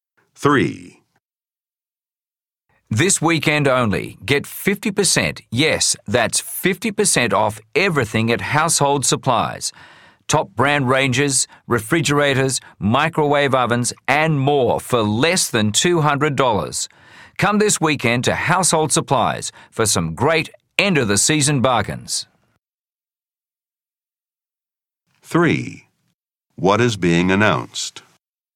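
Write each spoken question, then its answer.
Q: What is being announced?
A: A weekend sale with 50% off everything at Household Supplies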